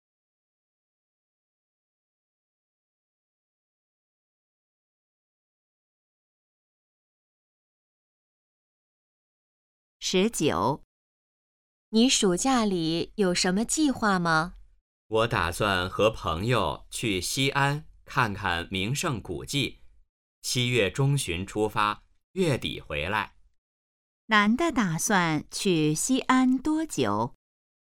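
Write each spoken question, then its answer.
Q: 男的打算去西安多久?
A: 半个月左右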